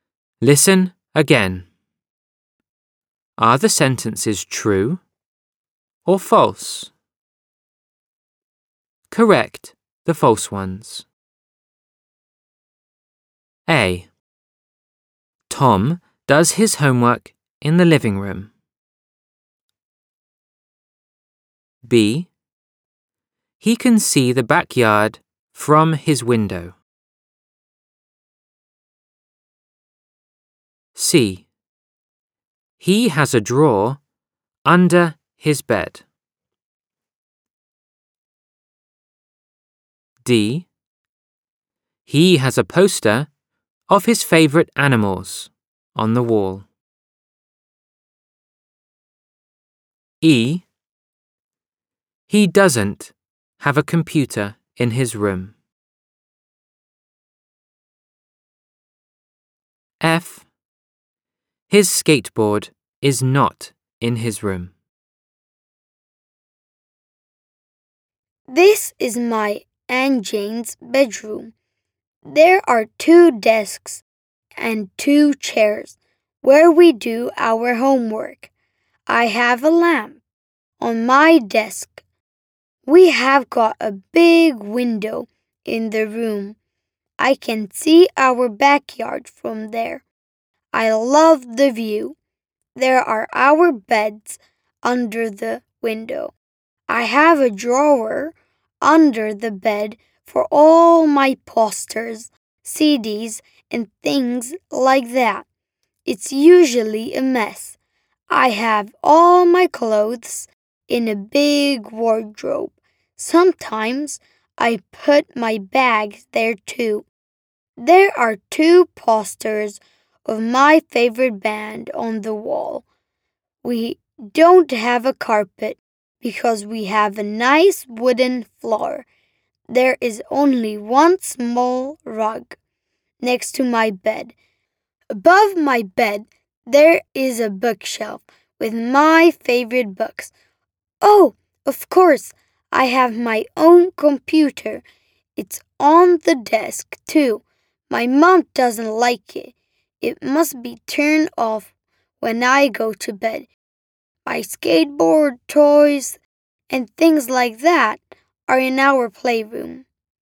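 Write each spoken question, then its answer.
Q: Tom does his homework in the living room.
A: False: he does his homework at a desk in his bedroom

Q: He can see the backyard from his window.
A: True

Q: He has a drawer under his bed.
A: True

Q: He has a poster of his favourite animals on the wall.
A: False: the posters are of his favourite band

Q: He doesn't have a computer in his room.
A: False: he has his own computer on the desk

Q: His skateboard is not in his room.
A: True: it is in the playroom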